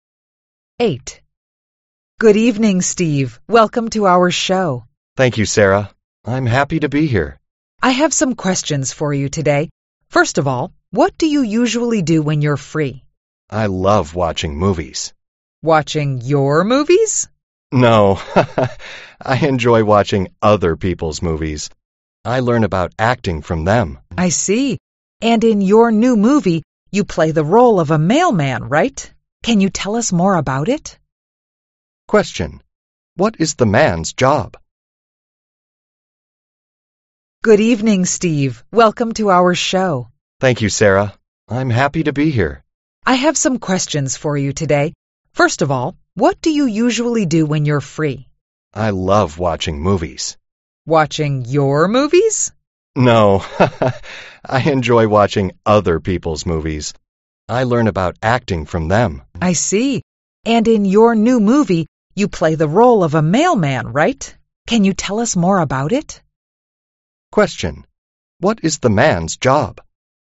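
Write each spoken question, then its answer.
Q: Question. What is the man's job?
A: An actor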